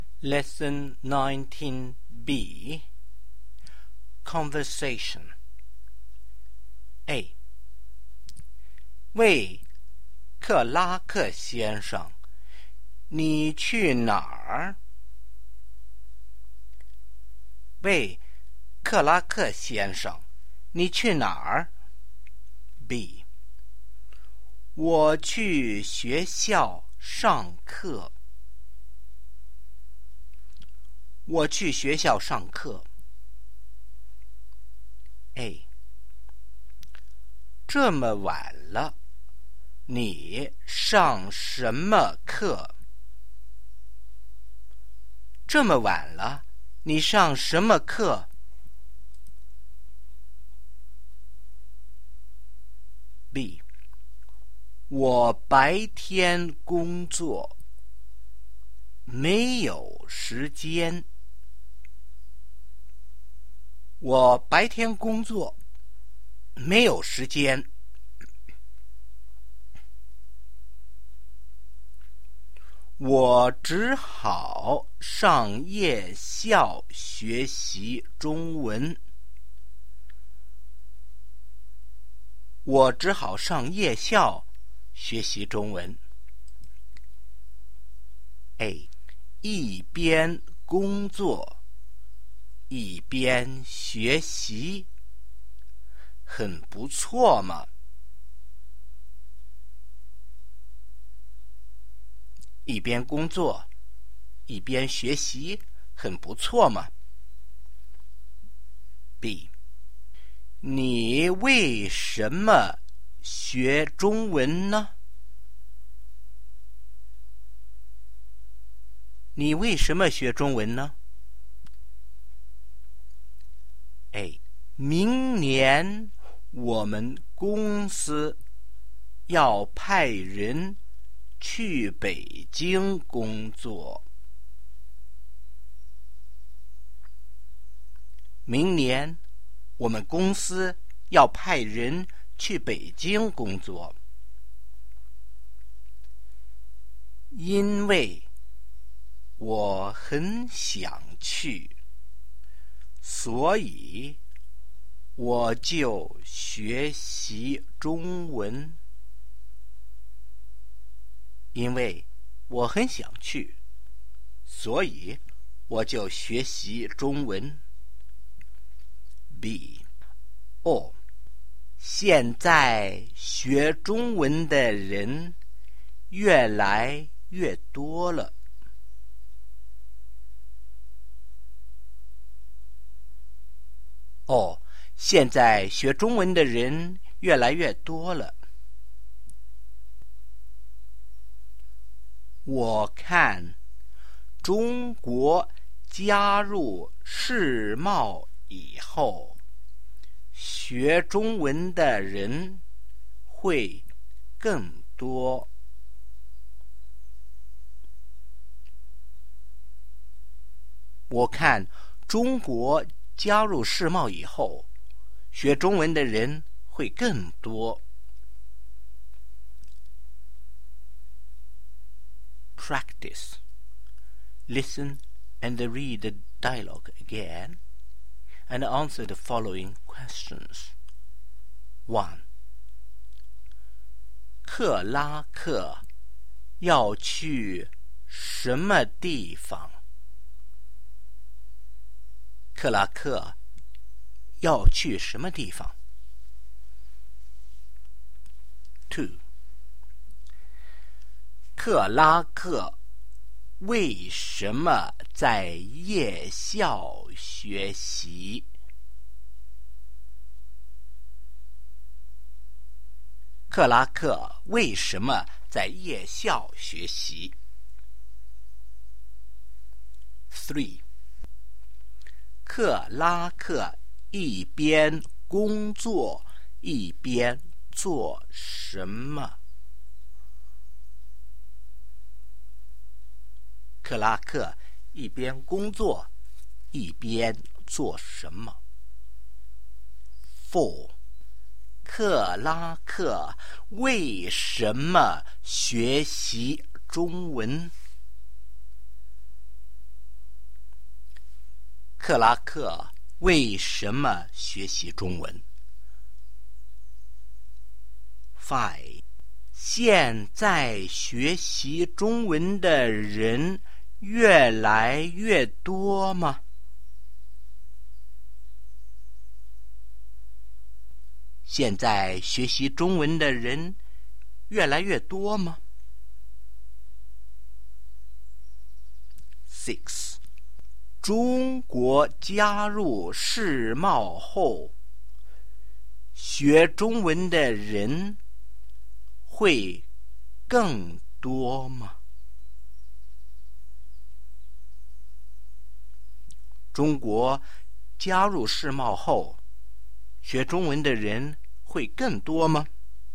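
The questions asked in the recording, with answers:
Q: 克拉克要去什么地方?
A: 去学校上课

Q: 克拉克为什么在夜校学习?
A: 他白天工作,没有时间

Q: 克拉克一边工作一边做什么?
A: 学习中文

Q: 克拉克为什么学习中文?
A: 明年公司要派人去北京工作,他很想去

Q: 现在学习中文的人越来越多吗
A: 是,越来越多

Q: 中国加入世贸后,学中文的人会更多吗?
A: 会更多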